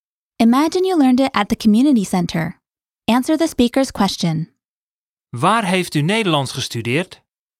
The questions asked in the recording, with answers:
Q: Waar heeft u Nederlands gestudeerd?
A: Ik heb het in het buurthuis geleerd.